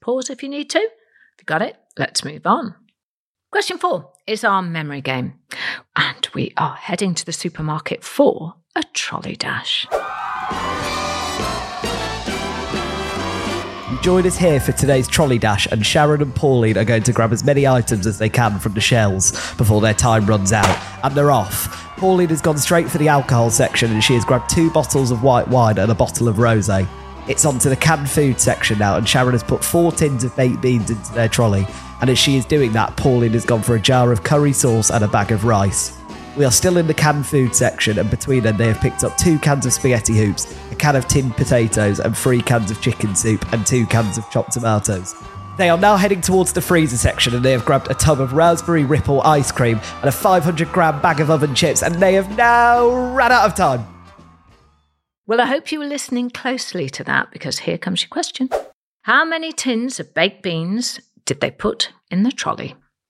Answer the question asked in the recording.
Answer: Well, they did manage to grab 4 tins of beans.